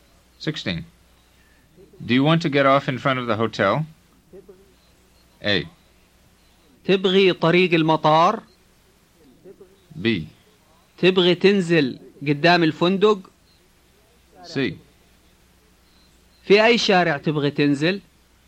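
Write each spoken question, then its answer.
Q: Do you want to get off in front of the hotel?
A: B: تبغي تنزل قدام الفندق؟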